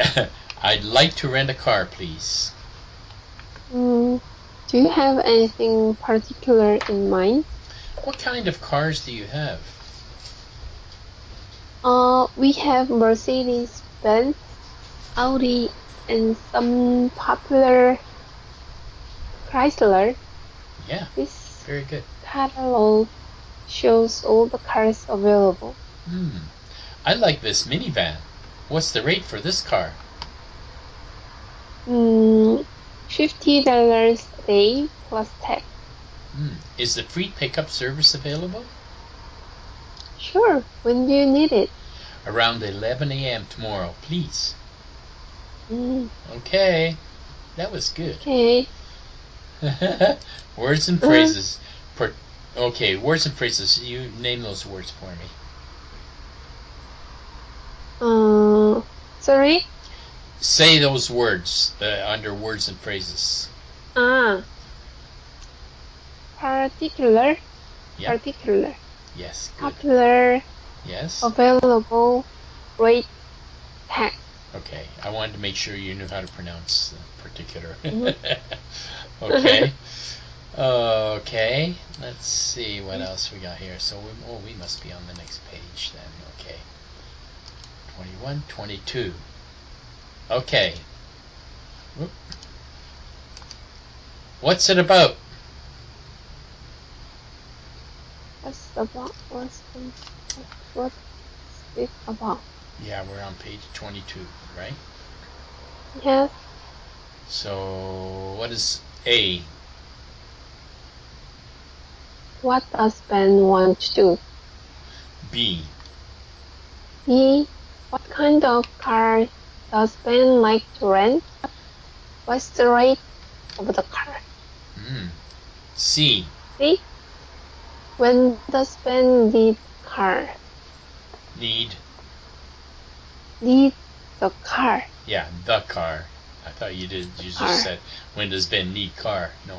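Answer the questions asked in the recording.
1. Rent a car
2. A minivan
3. $50 a day plus tax
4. Around 11 a.m. tomorrow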